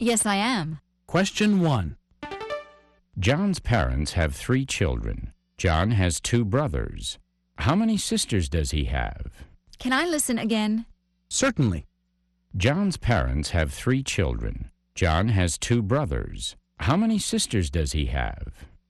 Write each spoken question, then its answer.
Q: John's parents have 3 children. John has 2 brothers. How many sisters does he have?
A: The answer is he doesn't have any sisters.